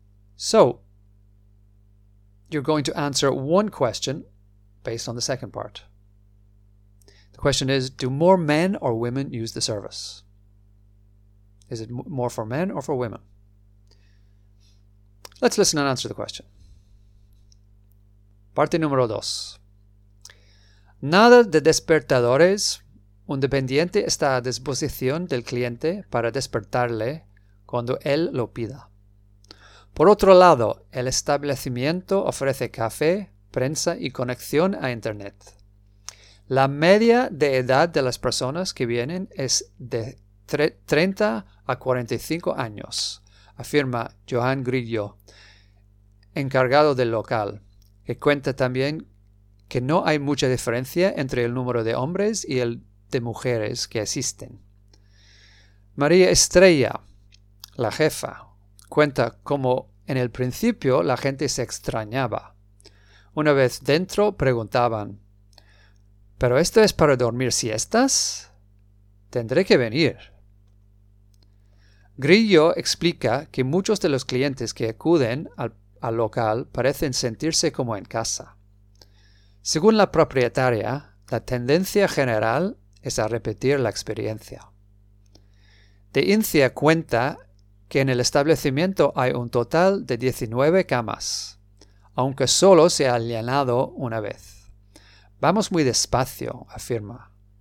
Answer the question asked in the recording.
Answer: No hay mucha diferencia entre el número de hombres y del, el de mujeres que existen.